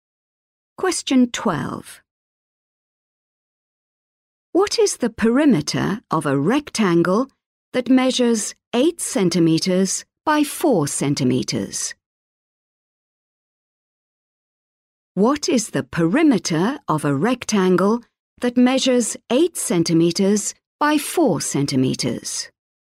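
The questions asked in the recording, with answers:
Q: What is the perimeter of a rectangle that measures 8 centimeters by 4 centimeters.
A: 24 centimeters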